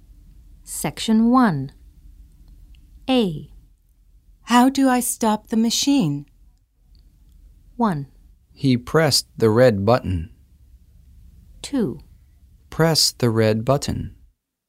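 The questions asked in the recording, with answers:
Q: How do I stop the machine?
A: 2: Press the red button.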